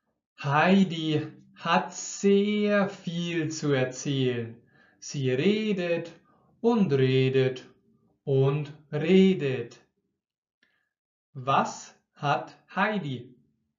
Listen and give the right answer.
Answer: Sehr viel zu erzählen. Sie hat sehr, sehr viel zu erzählen.